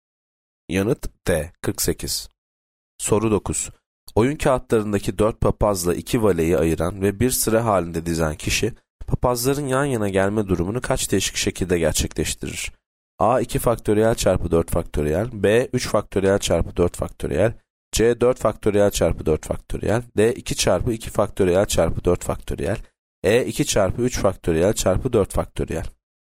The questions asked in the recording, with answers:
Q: Oyun kağıtlarındaki 4 papazla 2 valeyi ayıran ve bir sıra halinde dizen kişi papazların yan yana gelme durumunu kaç değişik şekilde gerçekleştirir?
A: Yanıt B 3 faktöriyel çarpı 4 faktöriyel.